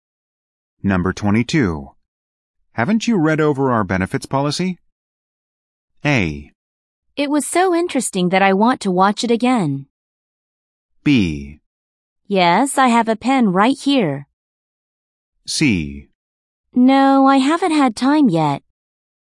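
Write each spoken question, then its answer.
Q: Haven't you read over our benefits policy?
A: C: No, I haven't had time yet.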